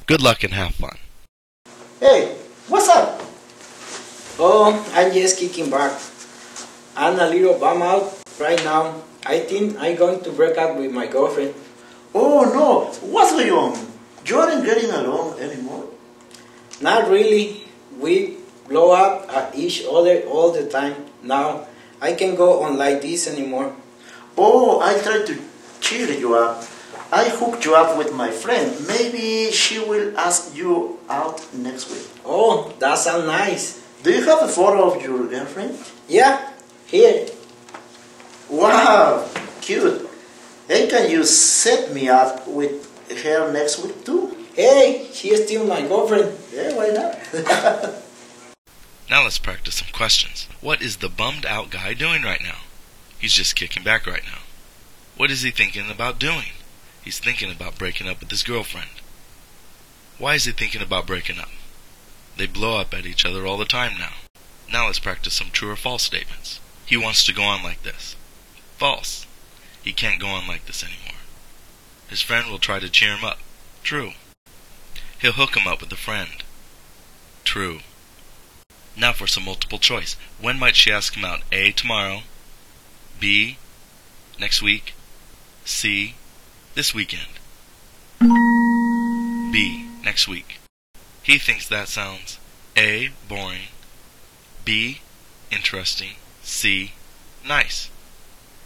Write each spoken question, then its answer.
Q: He thinks that sounds A. Boring. B. Interesting. C. Nice.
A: C. Nice.